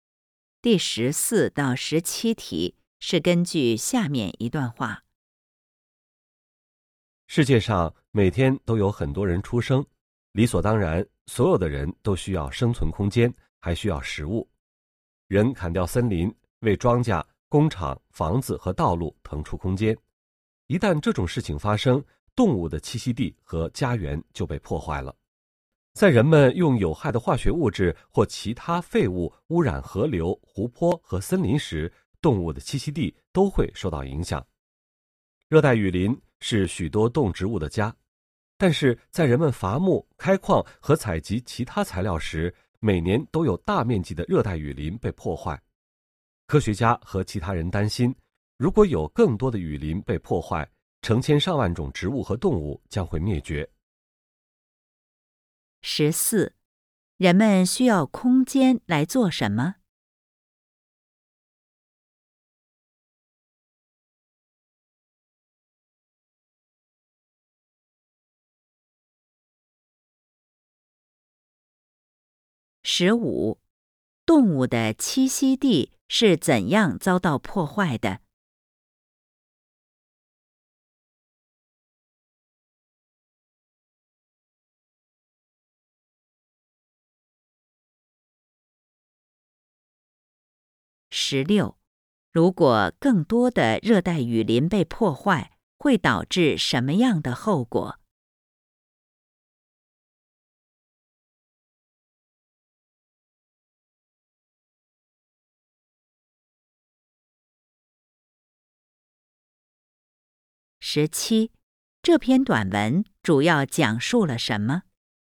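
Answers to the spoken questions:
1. 种庄稼、建工厂、房子和道路
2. 人砍伐森林,并用有害化学物质或废物污染河流、湖泊和森林
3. 成千上万种动植物将会灭绝
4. 人类活动破坏动物的栖息地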